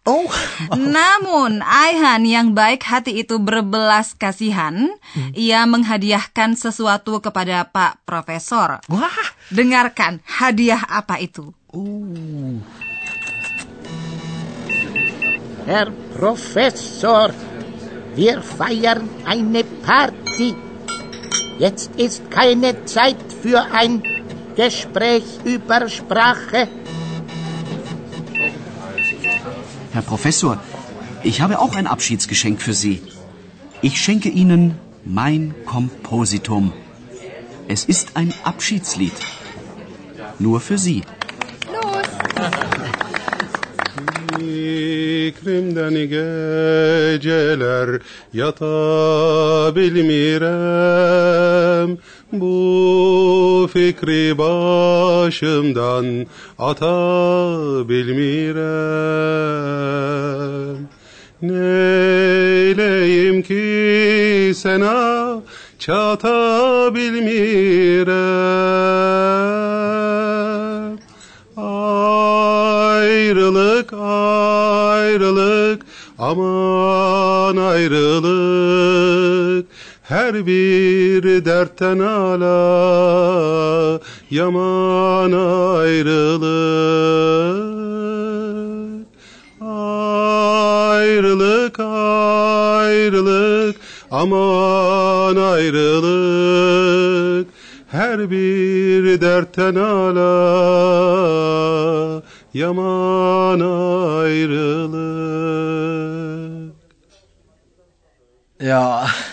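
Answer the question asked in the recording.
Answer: Sebuah lagu perpisahan (Abschiedslied)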